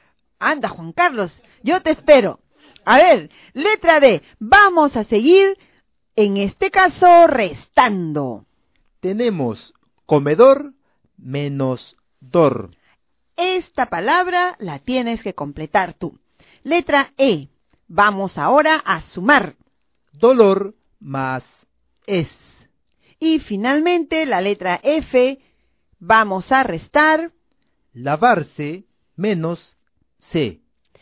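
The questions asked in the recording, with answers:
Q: Tenemos comedor menos dor.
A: come

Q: Dolor más es.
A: dolores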